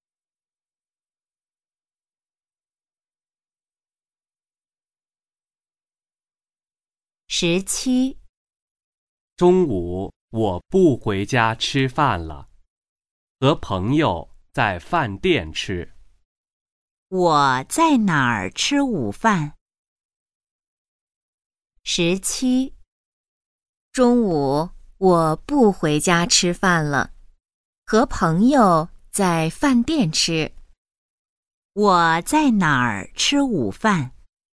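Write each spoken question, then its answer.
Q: 我在哪儿吃午饭?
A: 饭店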